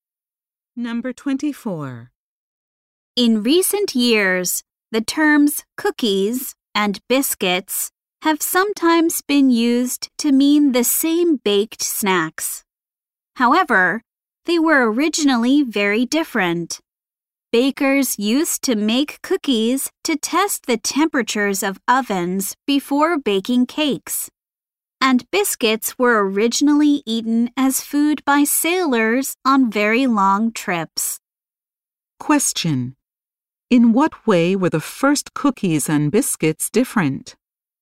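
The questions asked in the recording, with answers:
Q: In what way were the first cookies and biscuits different?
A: Cookies tested oven temperatures; biscuits were food for sailors.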